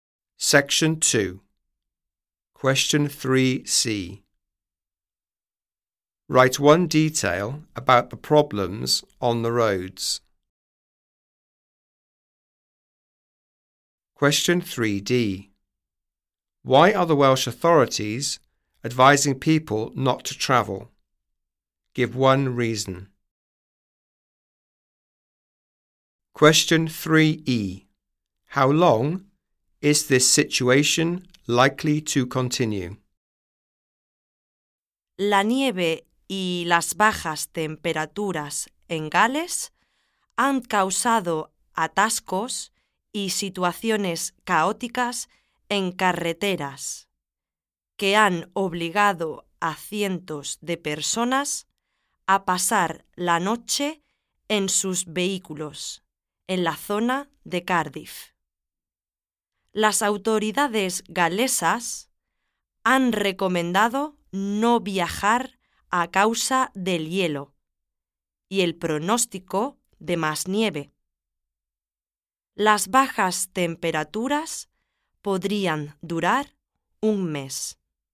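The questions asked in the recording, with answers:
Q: Write one detail about the problems on the roads.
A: Traffic jams; hundreds of people spent the night in their vehicles near Cardiff

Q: Why are the Welsh authorities advising people not to travel?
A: Because of ice and forecast of more snow

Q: How long is this situation likely to continue?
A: A month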